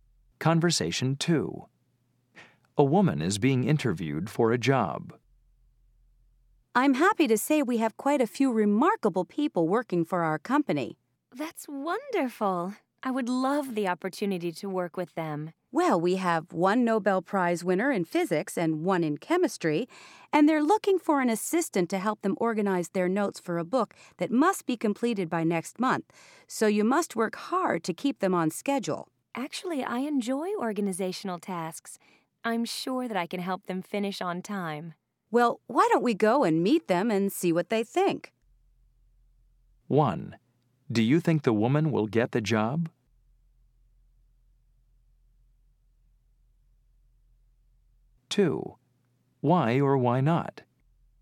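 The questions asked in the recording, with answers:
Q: Do you think the woman will get the job?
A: Yes, probably

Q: Why or why not?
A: She is enthusiastic and enjoys organizational tasks.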